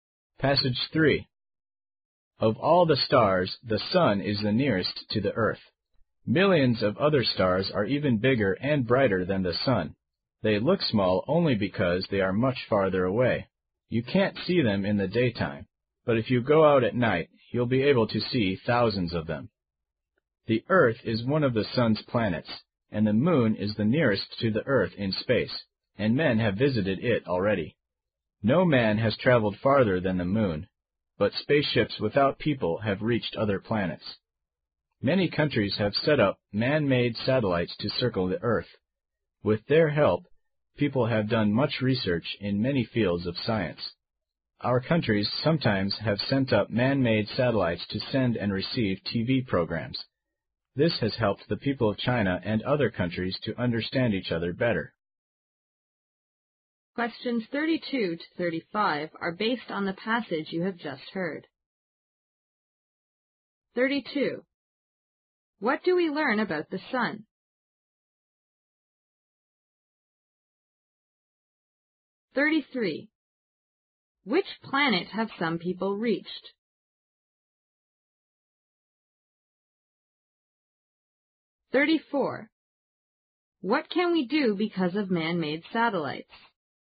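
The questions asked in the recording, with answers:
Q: What do we learn about the sun?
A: It is the star nearest to the Earth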